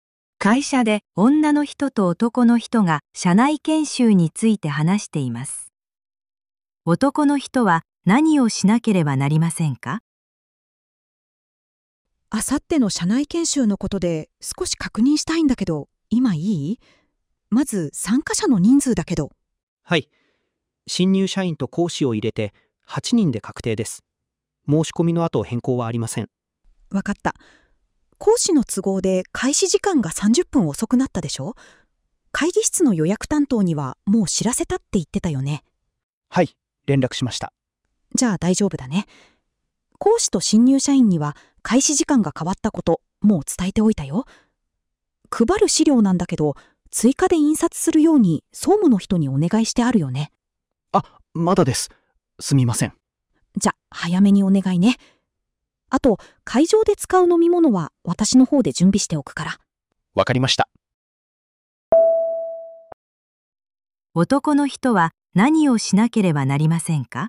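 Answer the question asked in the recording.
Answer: 総務の人に資料の追加印刷を頼む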